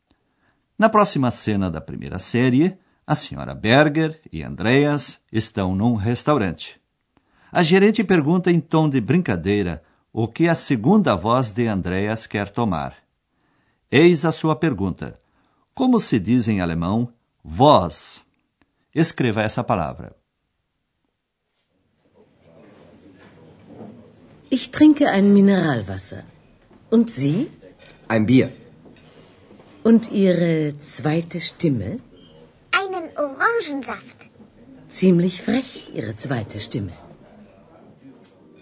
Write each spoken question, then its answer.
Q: Como se diz em alemão voz?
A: A palavra é Stimme.